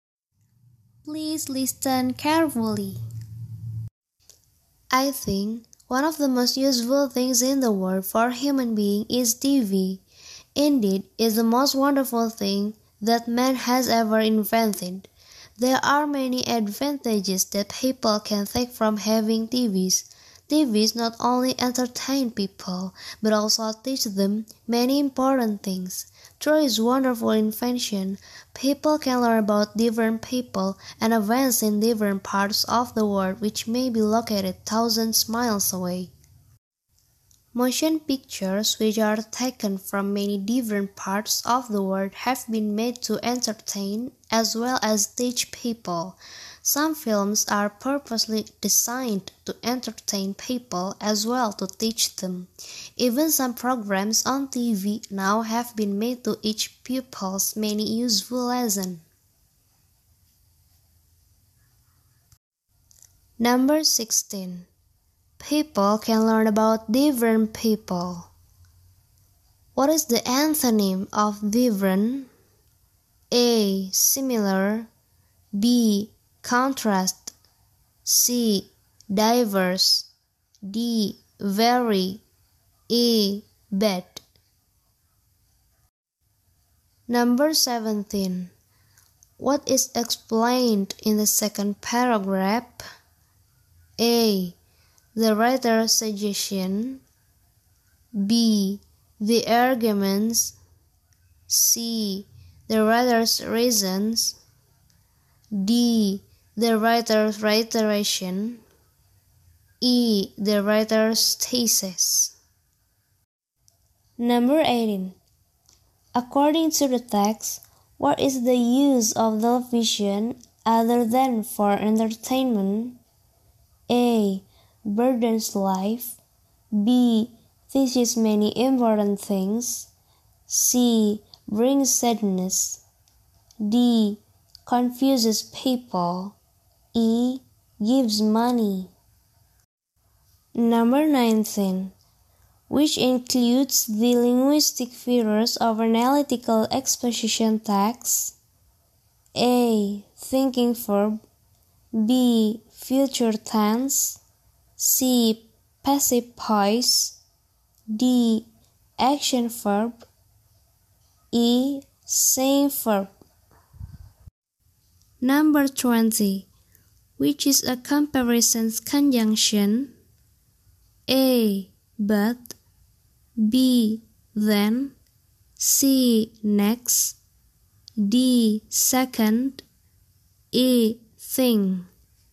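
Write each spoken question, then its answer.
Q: People can learn about different people. What is the antonym of different?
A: A: Similar

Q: According to the text, what is the use of television other than for entertainment?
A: B: Teaches many important things

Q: Which is a comparison conjunction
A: A: But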